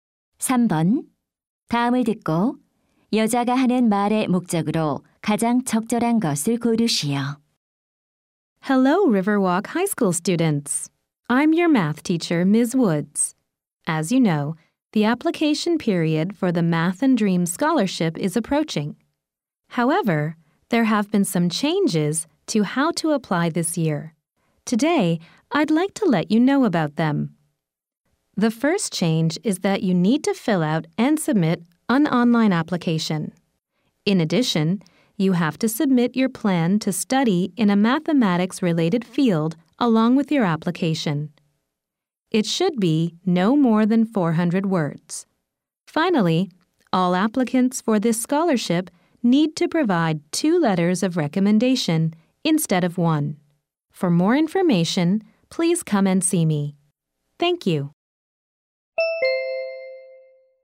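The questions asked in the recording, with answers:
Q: 다음을 듣고 여자가 하는 말의 목적으로 가장 적절한 것을 고르시오.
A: 장학금 신청 방법의 변경 사항을 안내하려고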